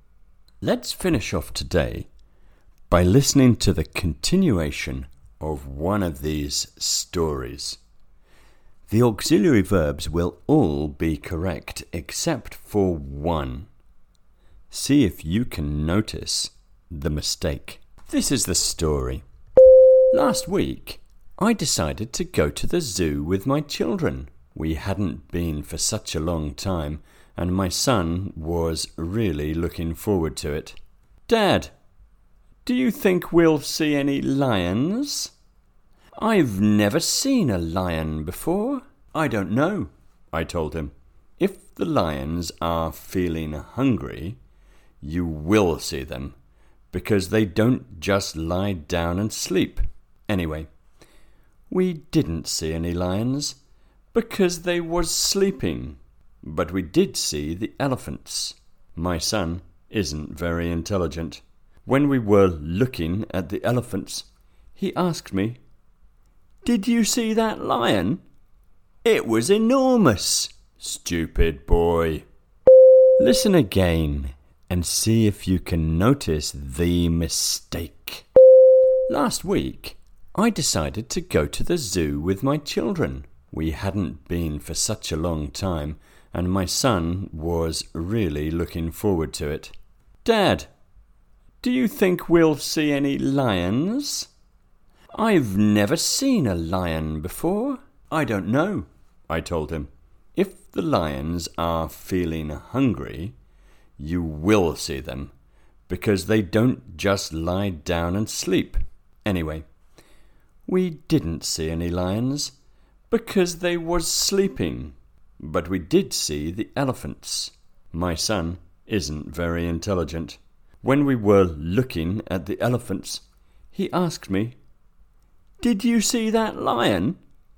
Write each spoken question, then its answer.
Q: See if you can notice the mistake.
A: you should have noticed that I said we didn't see any lions because they was sleeping.